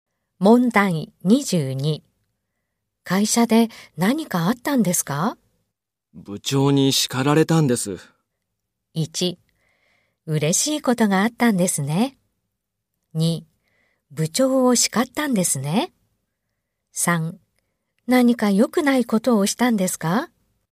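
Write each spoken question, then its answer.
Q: 会社で何かあったんですか?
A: 1: 何か良くないことをしたんですか?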